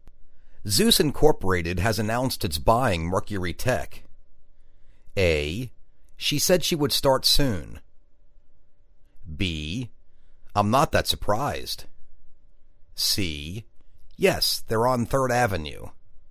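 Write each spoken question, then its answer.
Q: Zeus Incorporated has announced it's buying Mercury Tech.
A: B: I'm not that surprised.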